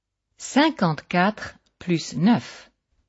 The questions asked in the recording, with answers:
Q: 54 plus 9.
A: Ça fait 63.